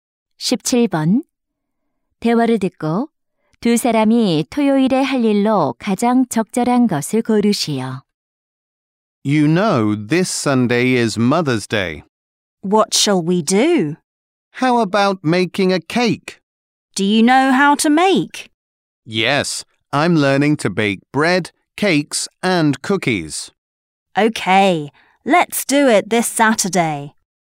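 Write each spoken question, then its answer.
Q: 대화를 듣고 두 사람이 토요일에 할 일로 가장 적절한 것을 고르시오.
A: 케이크 만들기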